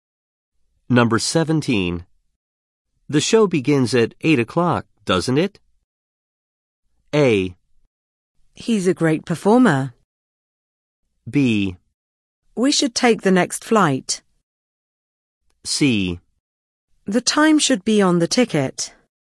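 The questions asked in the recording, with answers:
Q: The show begins at 8 o'clock, doesn't it?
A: C: The time should be on the ticket.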